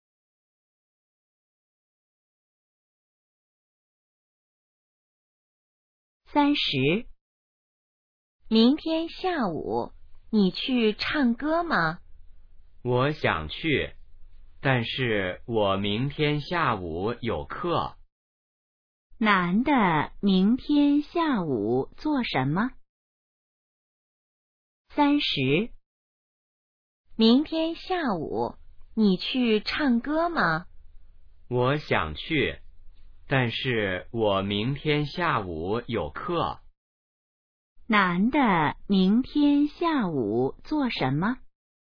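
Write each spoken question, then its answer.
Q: 男的明天下午做什么?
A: 上课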